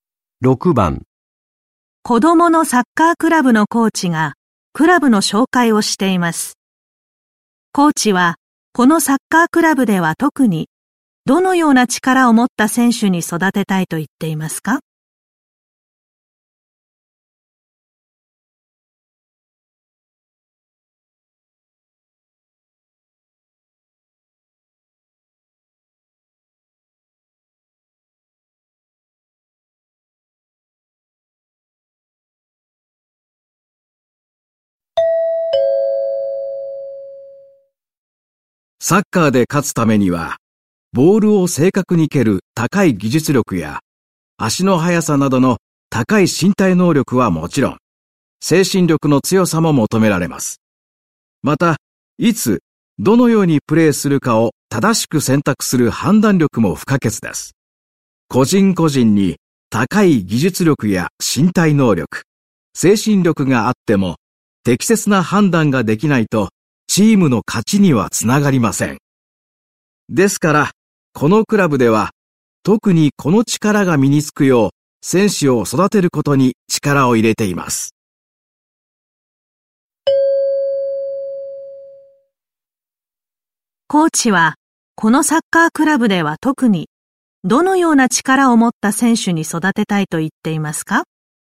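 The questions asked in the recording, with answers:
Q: コーチは、このサッカークラブでは特に、どのような力を持った選手に育てたいと言っていますか?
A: 適切な判断ができる力(判断力)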